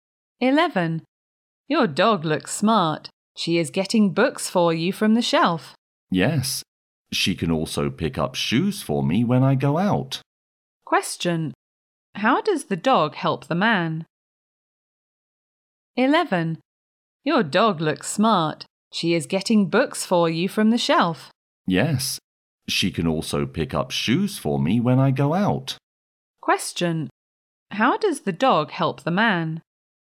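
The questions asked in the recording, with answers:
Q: How does the dog help the man?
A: She gets books from the shelf and picks up shoes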